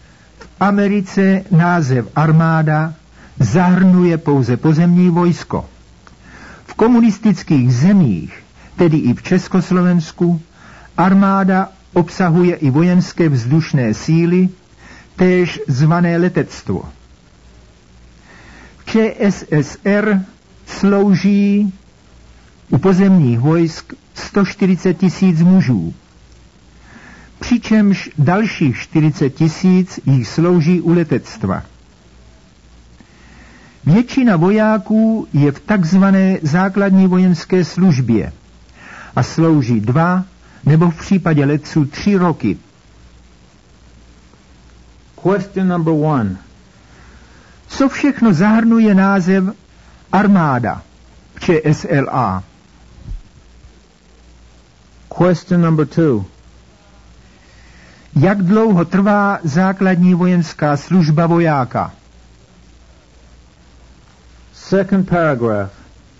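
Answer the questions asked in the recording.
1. Pozemní vojsko i vojenské vzdušné síly (letectvo)
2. 2 roky, u letců 3 roky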